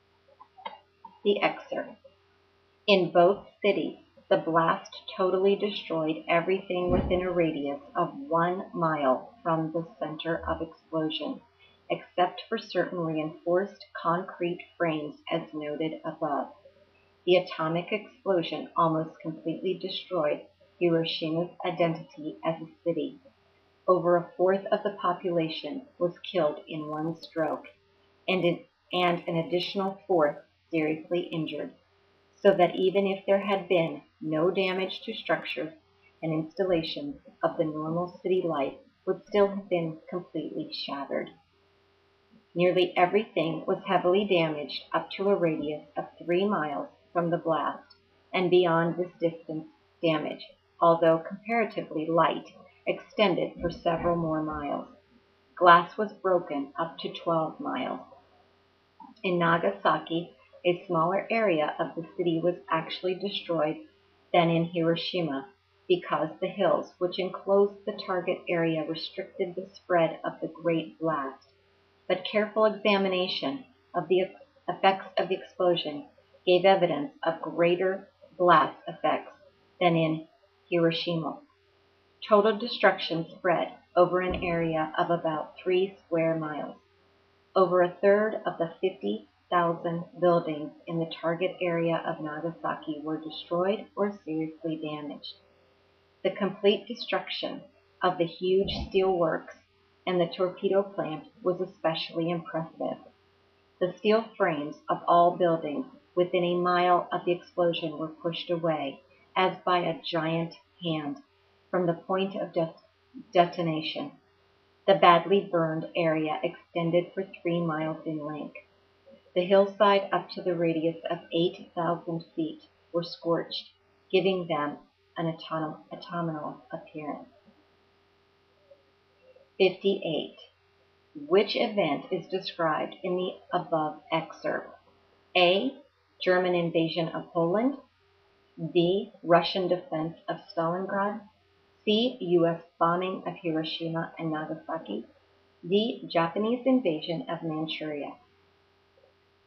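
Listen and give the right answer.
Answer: C: U.S. bombing of Hiroshima and Nagasaki.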